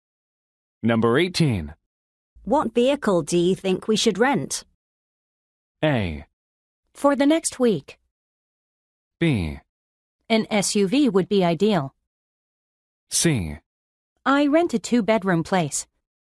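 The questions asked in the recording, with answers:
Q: What vehicle do you think we should rent?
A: B: An SUV would be ideal.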